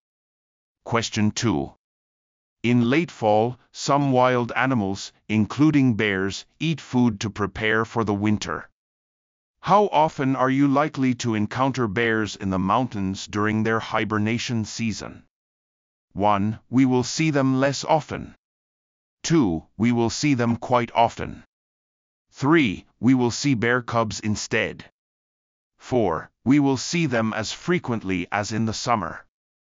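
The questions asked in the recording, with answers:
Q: How often are you likely to encounter bears in the mountains during their hibernation season?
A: 1: We will see them less often.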